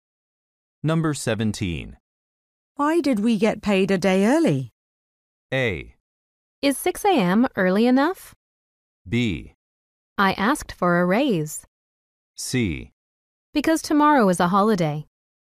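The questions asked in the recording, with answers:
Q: Why did we get paid a day early?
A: C: Because tomorrow is a holiday.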